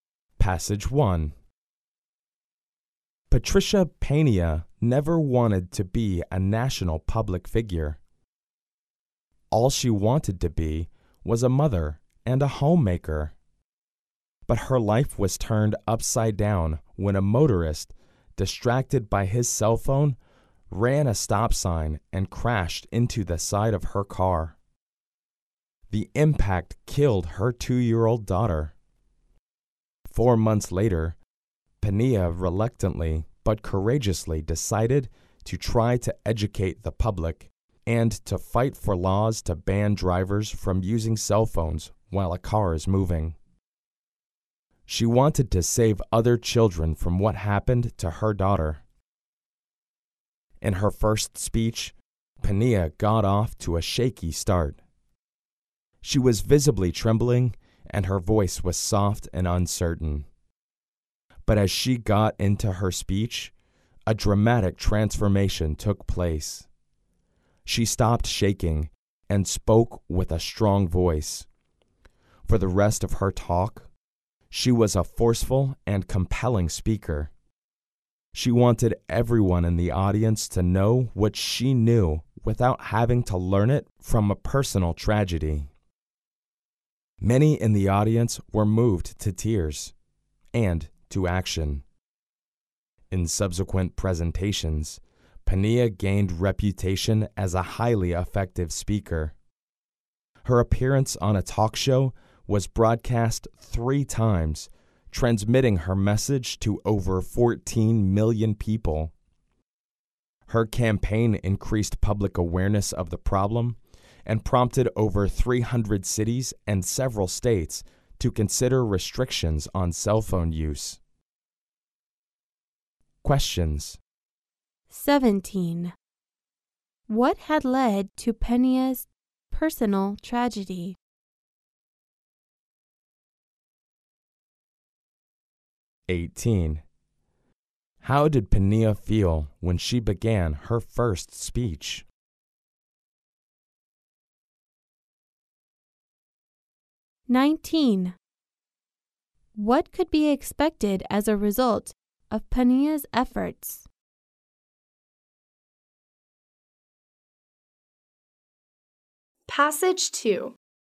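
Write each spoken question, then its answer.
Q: What had led to Pena's personal tragedy?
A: A motorist distracted by his cell phone ran a stop sign and crashed into her car.

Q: How did Pena feel when she began her first speech?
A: Nervous and uncertain; she was trembling.

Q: What could be expected as a result of Pena's efforts?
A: Laws restricting drivers' cell phone use.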